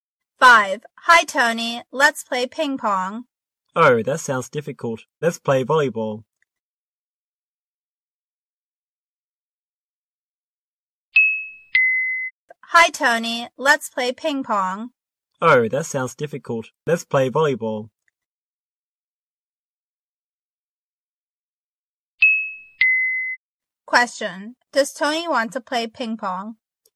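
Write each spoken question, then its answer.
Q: Does Tony want to play ping pong?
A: No, he doesn't.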